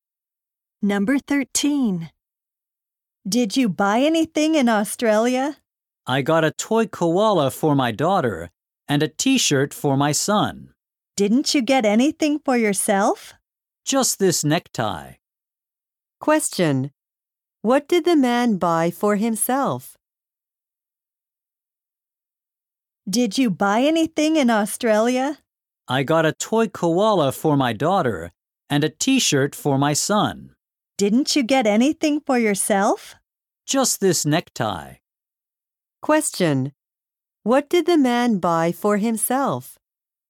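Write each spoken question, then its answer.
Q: What did the man buy for himself?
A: A necktie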